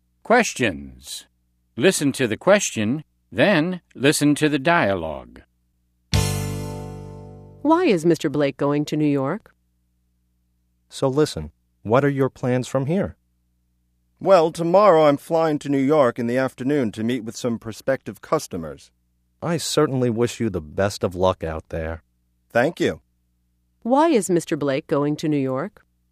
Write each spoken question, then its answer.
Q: Why is Mr. Blake going to New York?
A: He's going there to meet with some prospective customers.